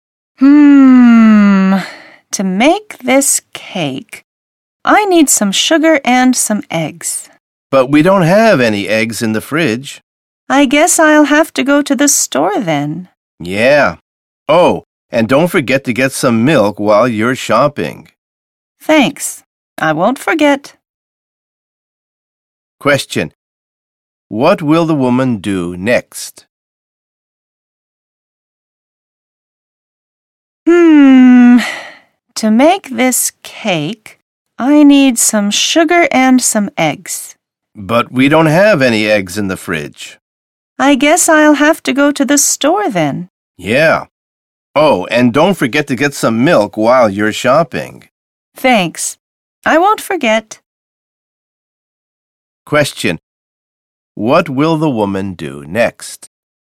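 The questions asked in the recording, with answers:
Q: What will the woman do next?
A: Go to the store to buy eggs and milk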